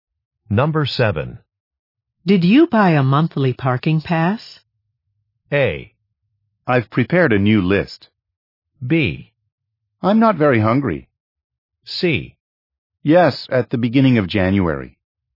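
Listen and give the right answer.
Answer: C: Yes, at the beginning of January.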